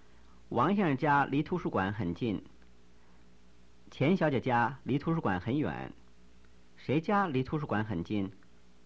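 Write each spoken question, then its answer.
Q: 谁家离图书馆很近?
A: 王先生家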